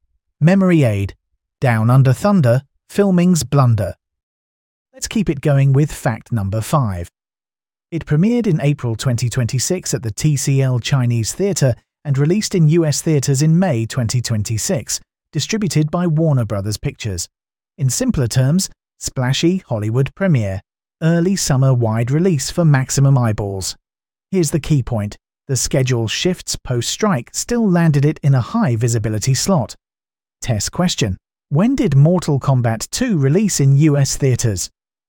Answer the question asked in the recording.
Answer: Correct answer, May 2026.